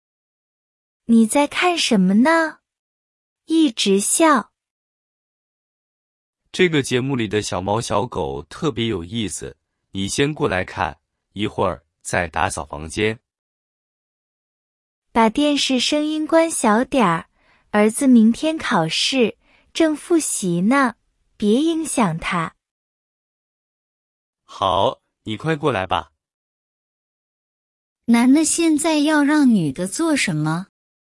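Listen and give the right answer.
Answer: 过来一起看电视节目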